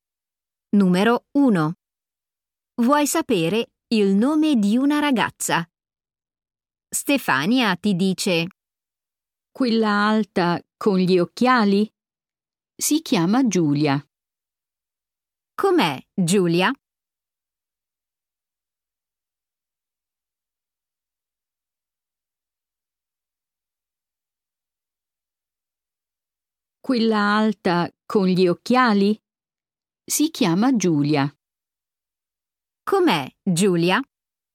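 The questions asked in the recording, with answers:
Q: Com'è Giulia?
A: alta con gli occhiali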